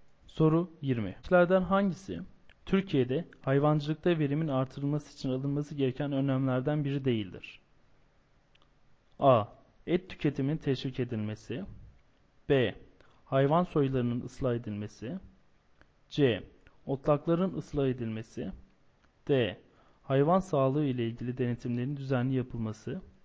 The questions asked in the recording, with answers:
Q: Çiftliklerden hangisi Türkiye'de hayvancılıkta verimin artırılması için alınması gereken önlemlerden biri değildir?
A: Doğru yanıt B şıkkı.